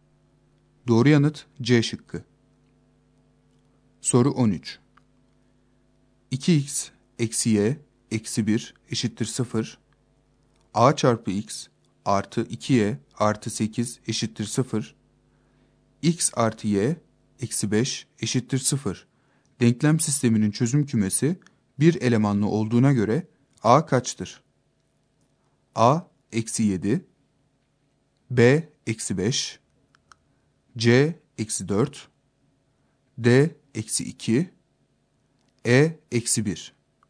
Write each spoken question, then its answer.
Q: Denklem sisteminin çözüm kümesi bir elemanlı olduğuna göre A kaçtır?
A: Doğru yanıt A şıkkı.